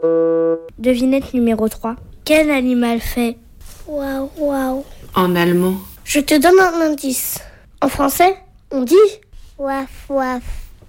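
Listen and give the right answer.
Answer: le chien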